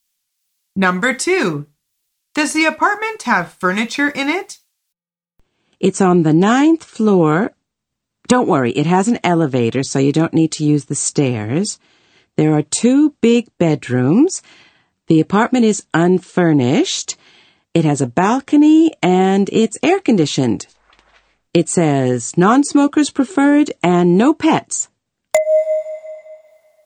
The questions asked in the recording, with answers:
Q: Does the apartment have furniture in it?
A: The answer is no. She says the apartment is unfurnished.